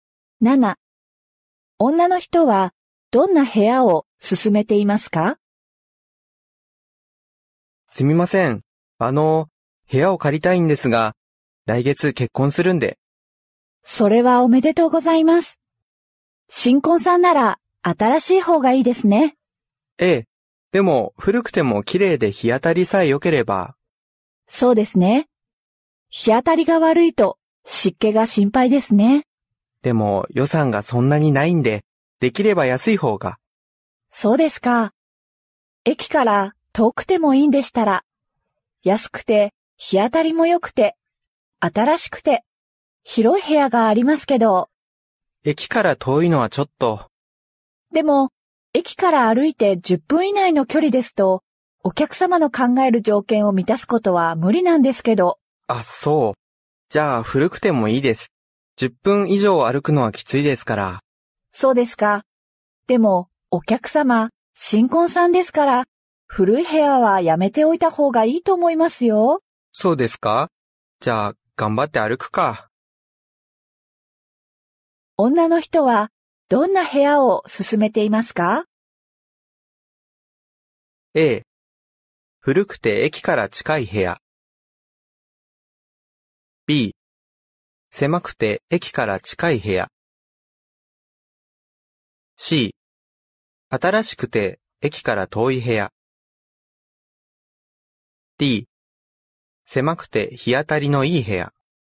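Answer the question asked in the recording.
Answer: C: 新しくて駅から遠い部屋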